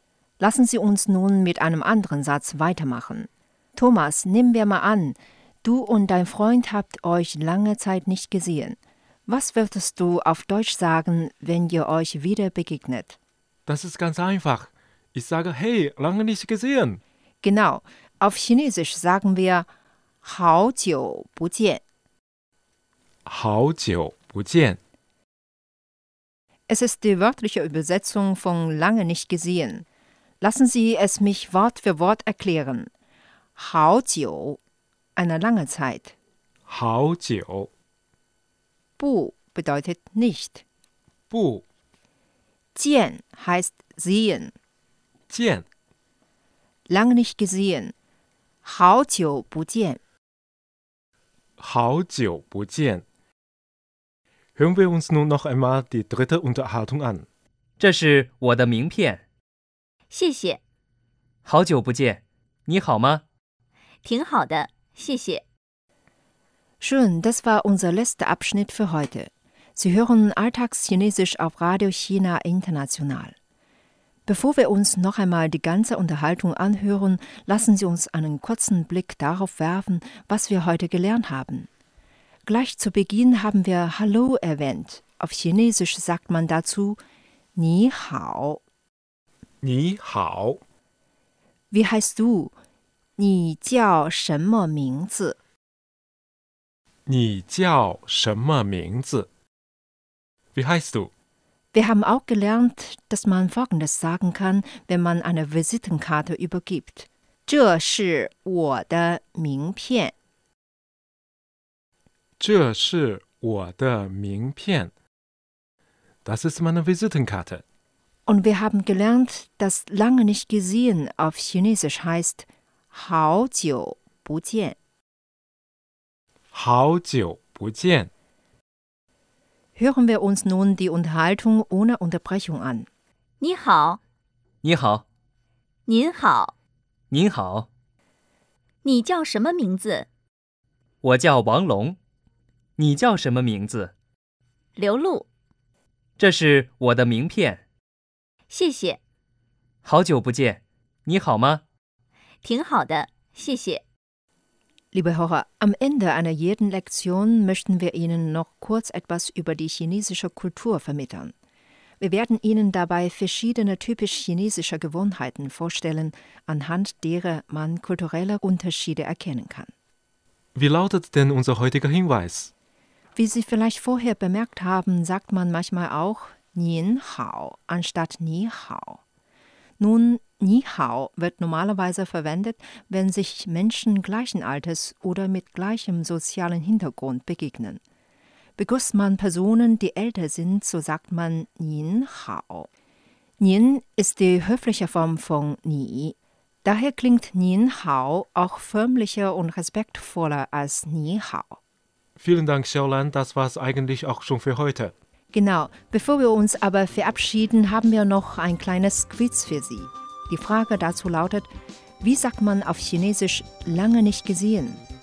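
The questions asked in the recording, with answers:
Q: Die Frage dazu lautet, wie sagt man auf Chinesisch lange nicht gesehen?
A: 好久不见 (Hao jiu bu jian)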